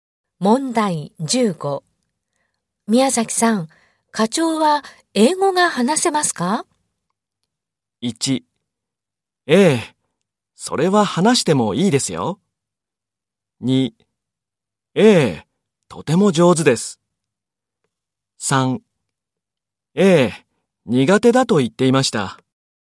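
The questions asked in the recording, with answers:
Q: 宮崎さん、課長は英語が話せますか?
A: 1: ええ、とても上手です。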